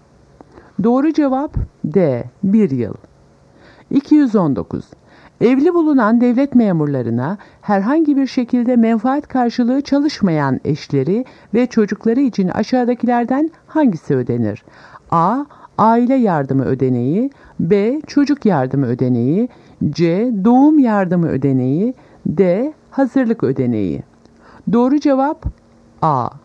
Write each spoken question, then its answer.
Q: Evli bulunan devlet memurlarına herhangi bir şekilde menfaat karşılığı çalışmayan eşleri ve çocukları için aşağıdakilerden hangisi ödenir?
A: Doğru cevap A. Aile yardımı ödeneği.